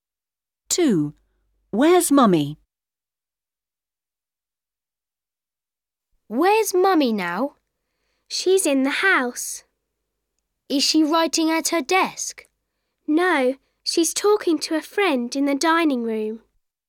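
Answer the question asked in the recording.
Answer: In the dining room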